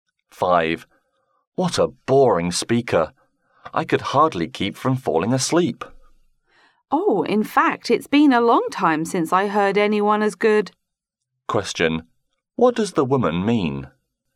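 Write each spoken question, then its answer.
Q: What does the woman mean?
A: She thinks the speaker was very good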